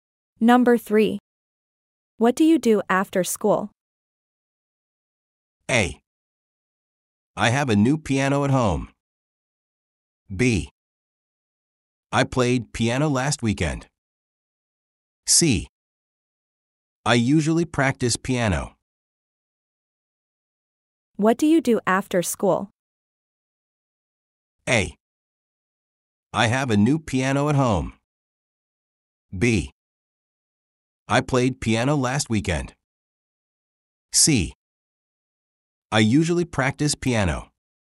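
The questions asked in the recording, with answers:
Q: What do you do after school?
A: C: I usually practice piano.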